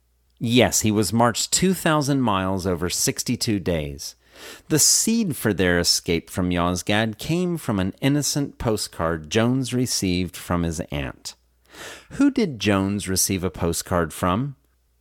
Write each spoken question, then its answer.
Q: Who did Jones receive a postcard from?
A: Jones received a postcard from his aunt.